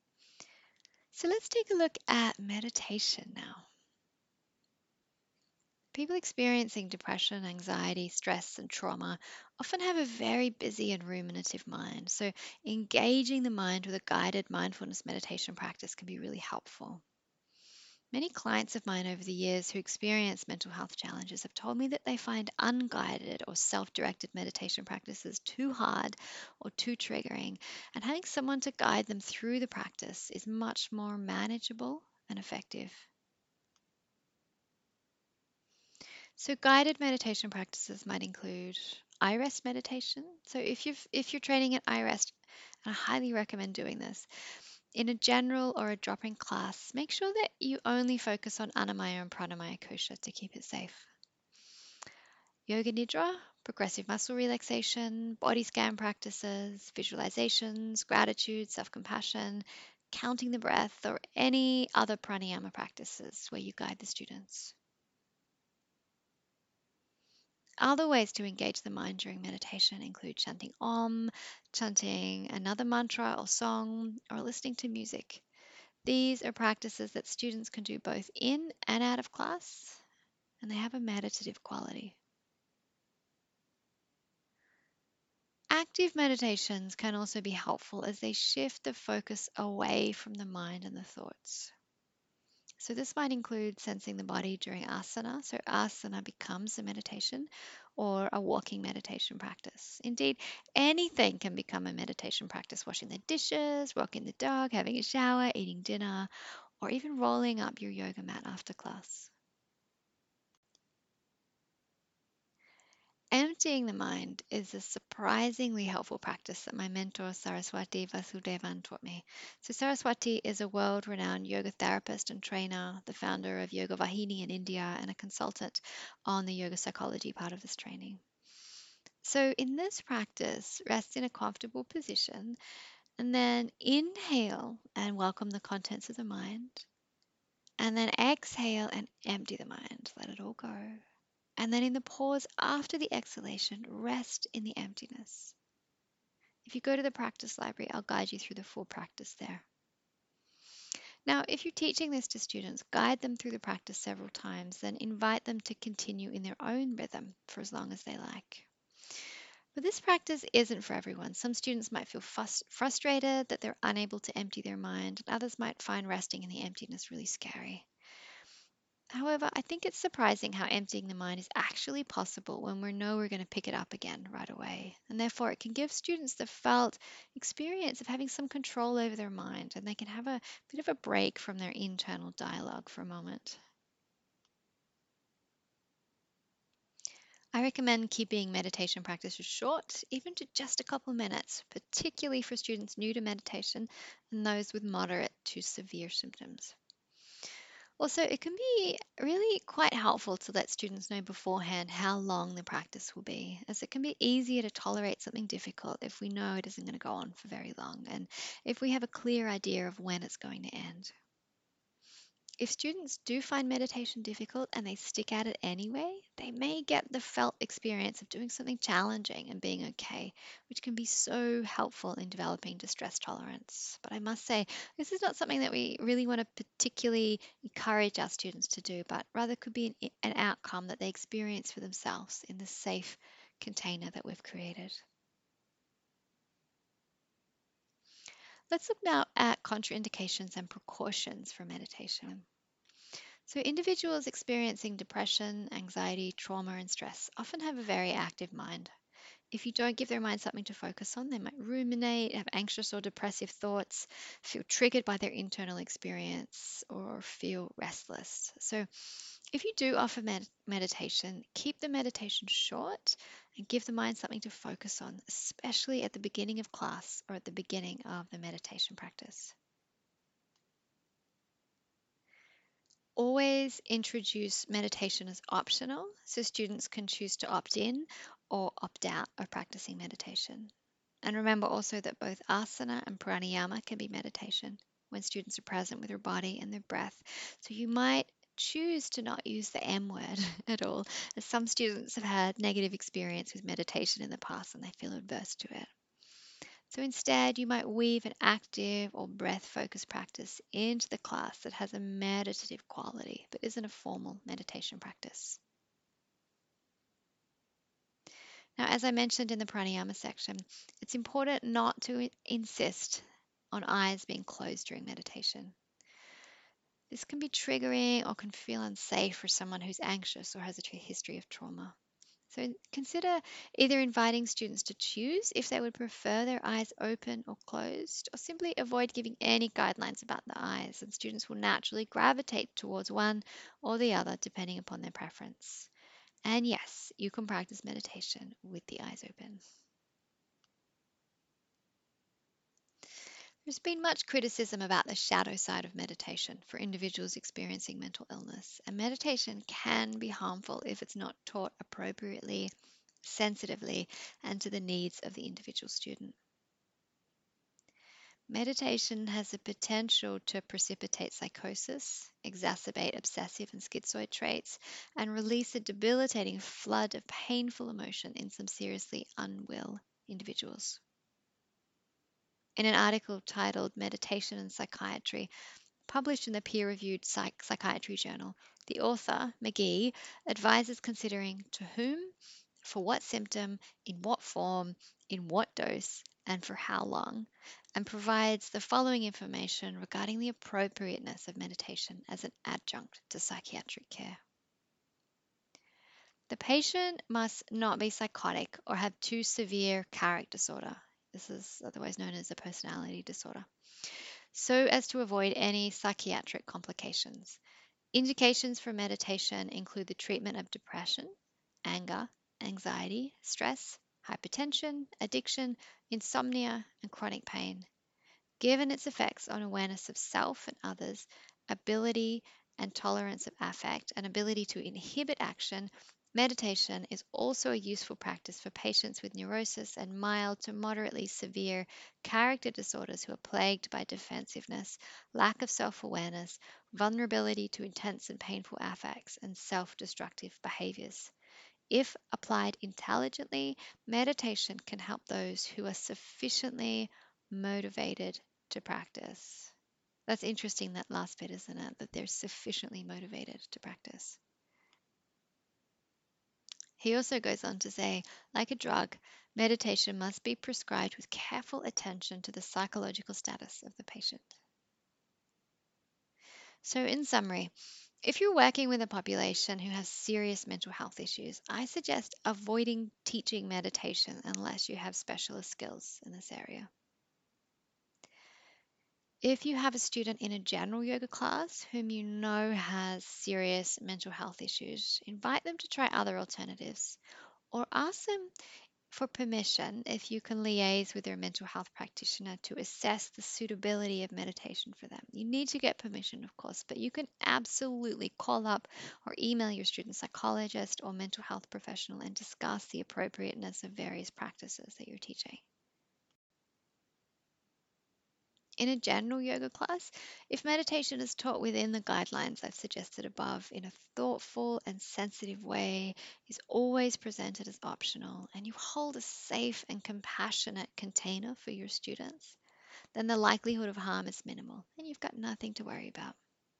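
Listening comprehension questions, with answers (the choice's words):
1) When teaching meditation to students with mental health challenges, what can be helpful in reducing rajas and tamas, and in doing so cultivating sattva?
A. Engage the mind with a guided mindfulness meditation practice.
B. Teach active meditations.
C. Keep the meditations short, give the mind something to focus on and let students know how long the practice will be.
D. All of the above.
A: All of the above.

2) When teaching meditation, what can you do to reduce the likelihood of a student being triggered or experiencing an abreaction?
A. Always introduce meditation as optional and offer other alternatives.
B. Never insist on eyes being closed.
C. Avoid teaching meditation to students with serious mental health issues, unless you have specialist skills in this area.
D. All of the above.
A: All of the above.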